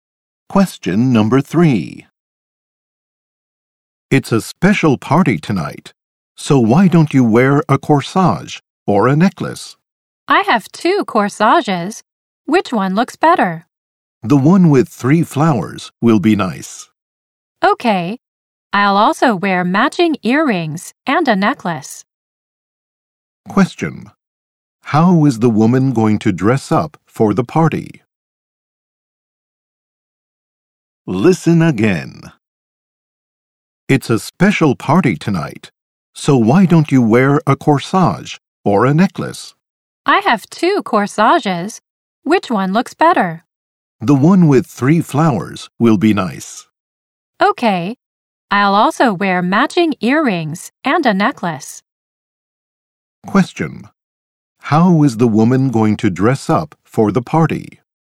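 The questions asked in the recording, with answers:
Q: How is the woman going to dress up for the party?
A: With a corsage with three flowers, matching earrings and a necklace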